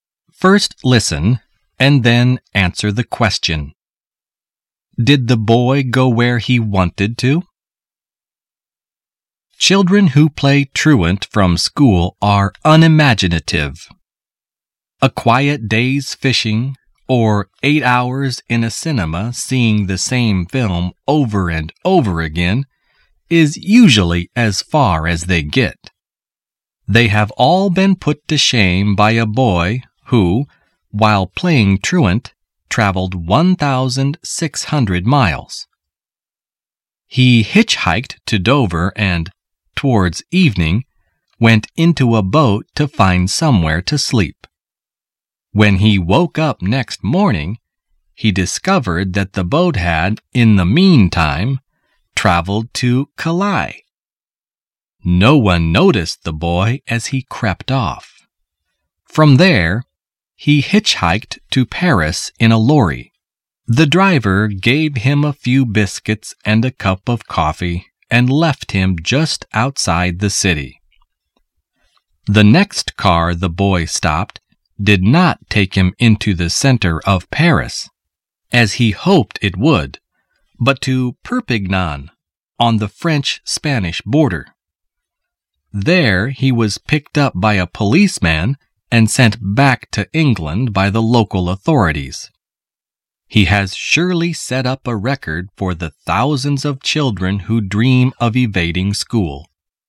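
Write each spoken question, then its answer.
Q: Did the boy go where he wanted to?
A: No, he wanted to go to Paris but ended up in Perpignan.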